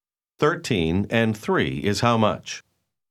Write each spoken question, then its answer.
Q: 13 and 3 is how much?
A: 16.